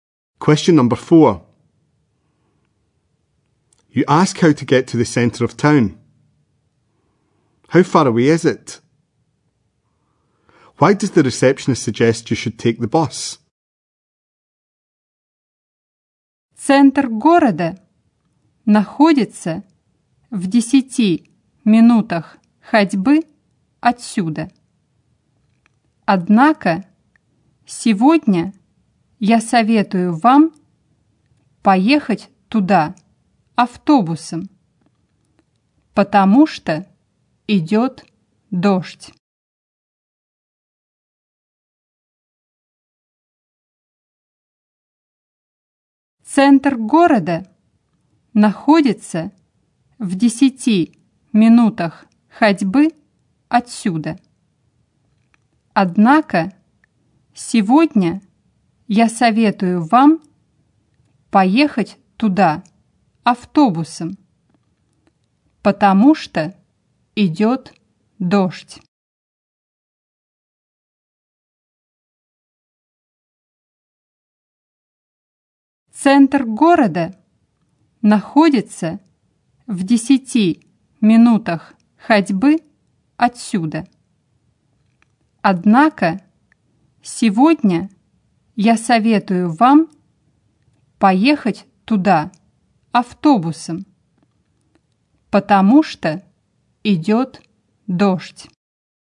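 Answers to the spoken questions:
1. 10 minutes' walk
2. Because it is raining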